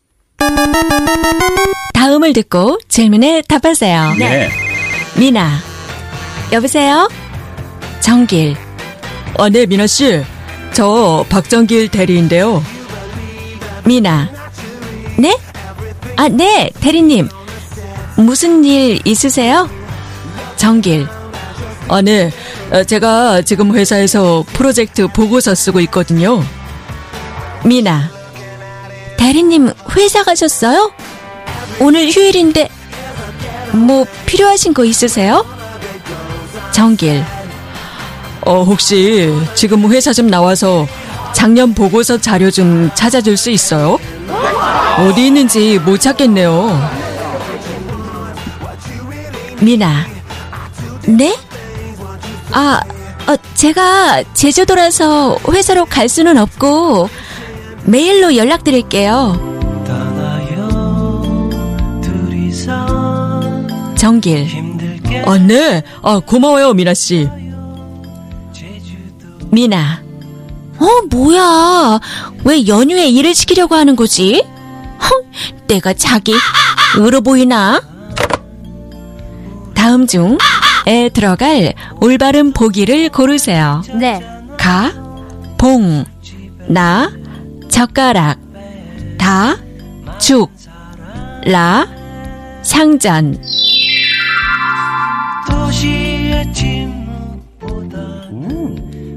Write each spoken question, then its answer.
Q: 다음 중에 들어갈 올바른 보기를 고르세요.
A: Ka. Bong is not a ball. It is a pushover, sitting target.